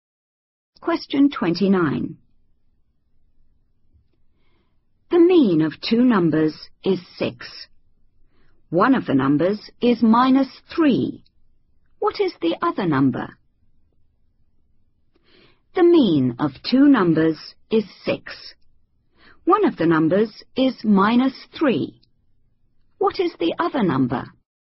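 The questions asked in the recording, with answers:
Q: What is the other number?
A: 15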